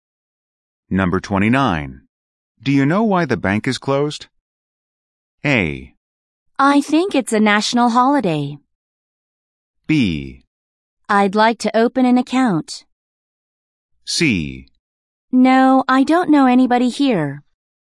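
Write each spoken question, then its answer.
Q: Do you know why the bank is closed?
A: A: I think it's a national holiday.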